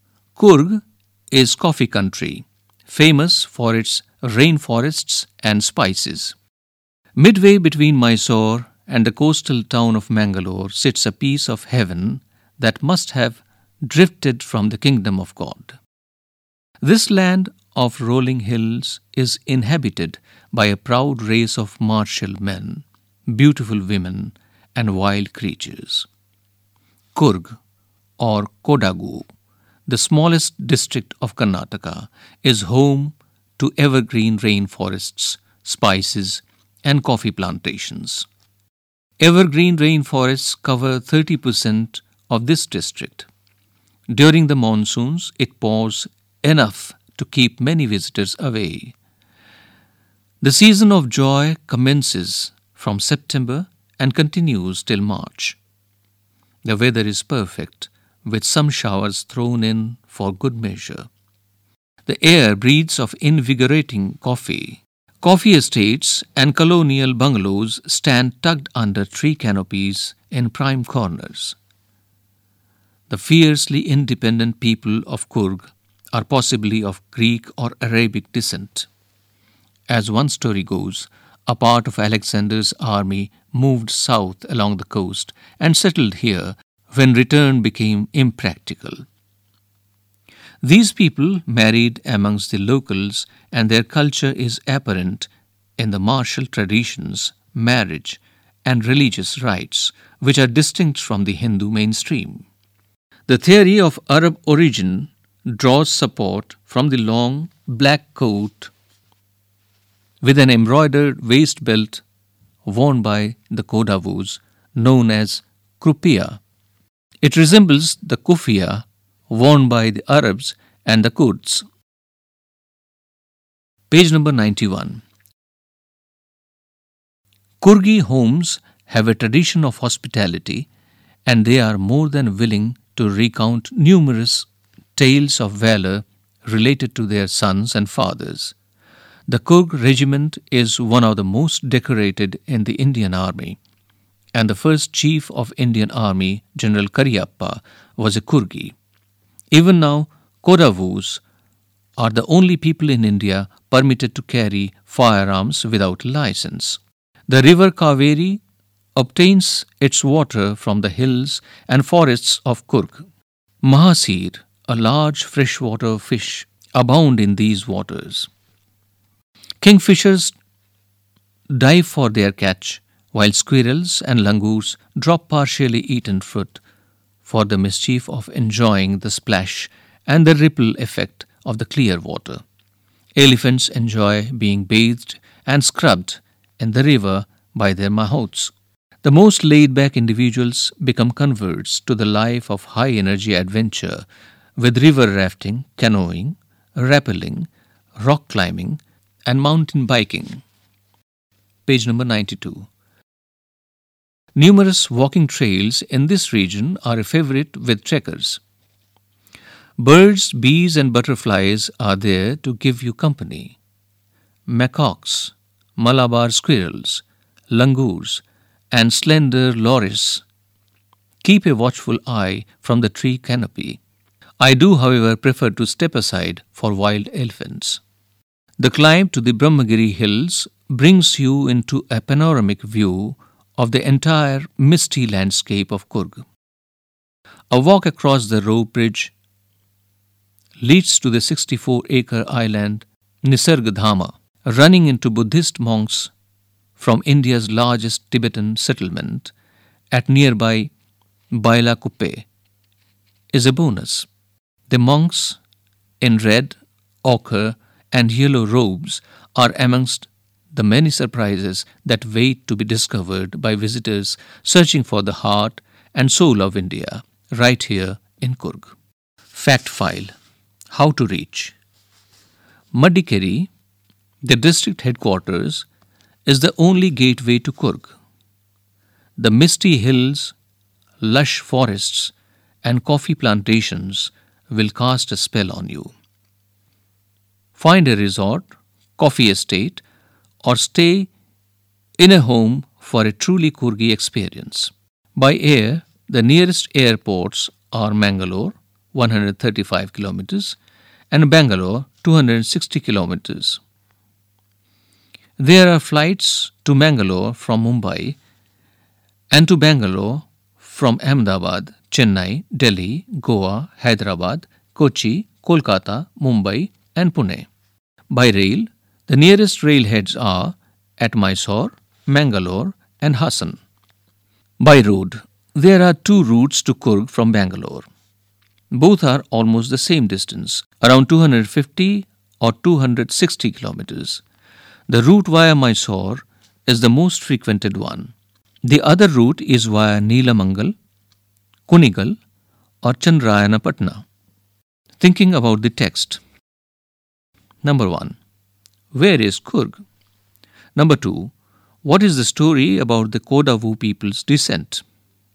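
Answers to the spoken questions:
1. Midway between Mysore and Mangalore, in Karnataka
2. Part of Alexander's army moved south along the coast and settled there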